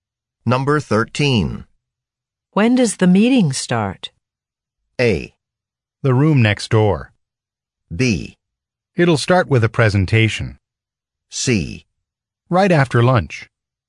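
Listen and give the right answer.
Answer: C: Right after lunch.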